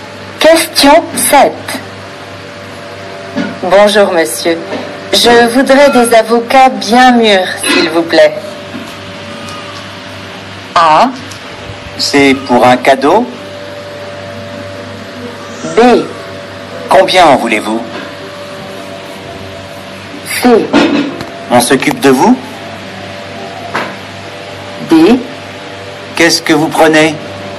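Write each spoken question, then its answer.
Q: Bonjour, monsieur. Je voudrais des avocats bien mûrs, s'il vous plaît.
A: B: Combien en voulez-vous?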